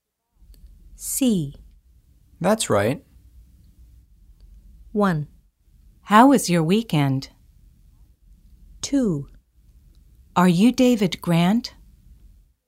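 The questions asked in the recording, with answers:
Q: That's right.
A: 2: Are you David Grant?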